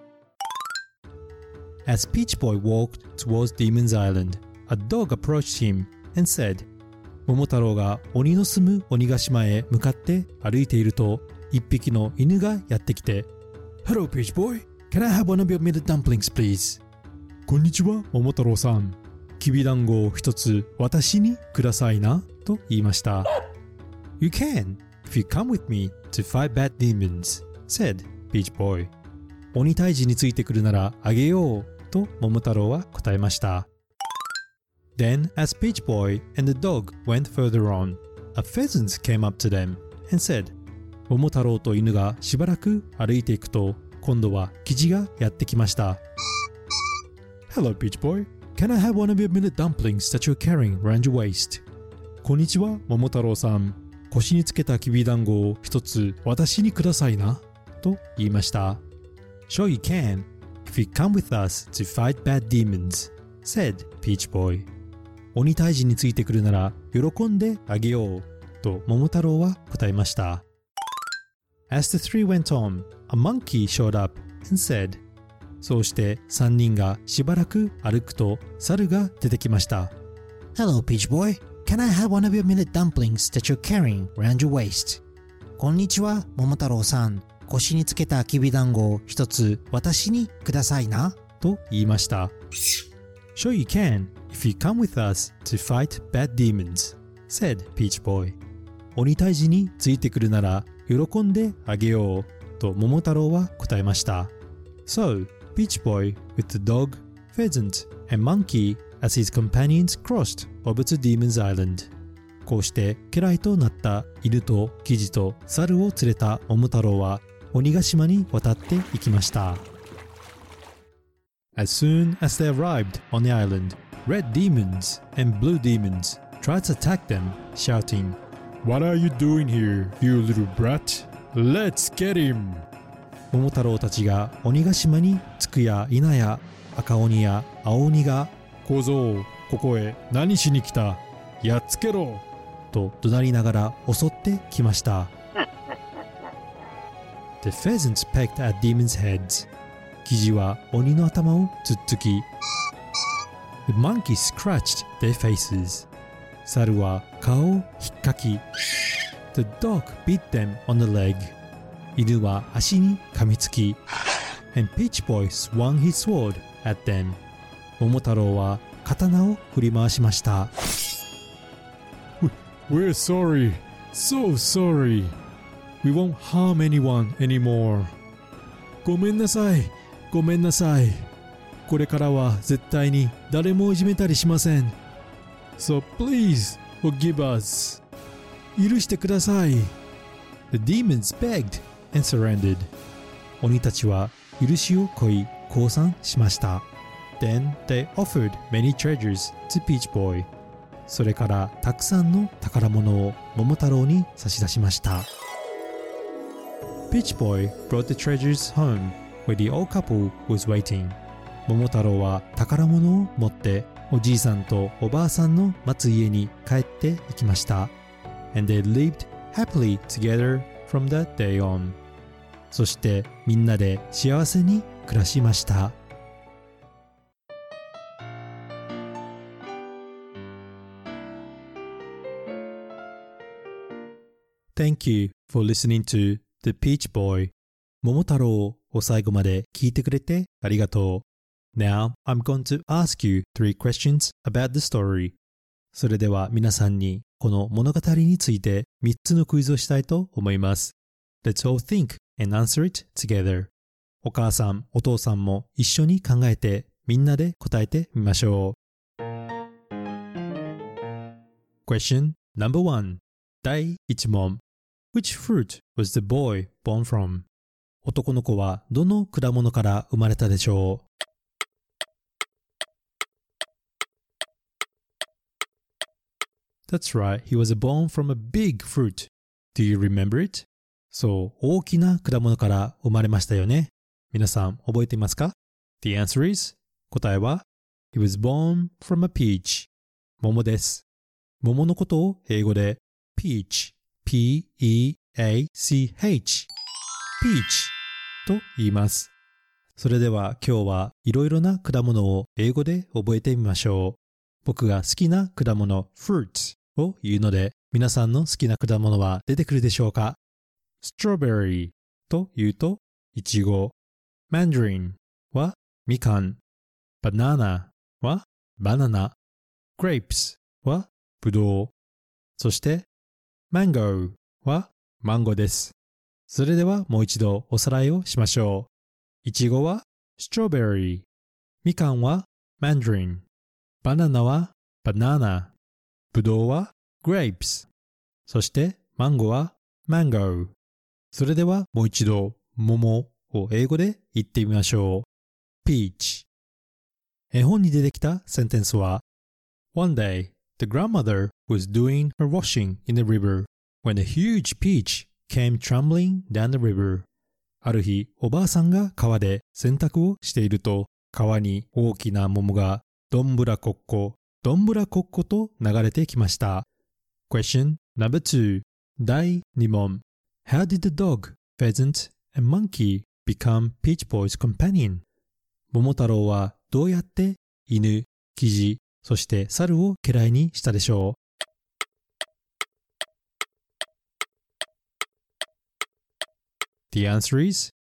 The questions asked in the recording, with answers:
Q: How did the dog, pheasant, and monkey become Peach Boy's companion?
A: by giving away his millet dumplings